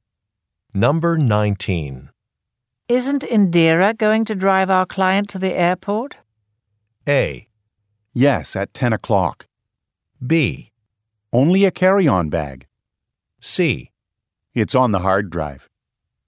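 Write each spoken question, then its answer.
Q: Isn't Indira going to drive our client to the airport?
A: A: Yes, at 10 o'clock.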